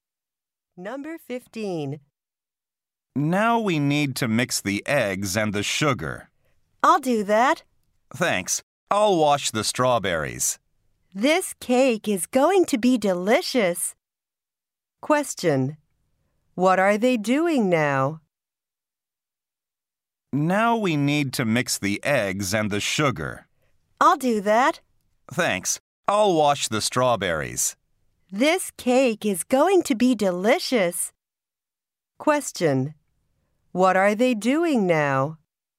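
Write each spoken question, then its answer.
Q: What are they doing now?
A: Making a cake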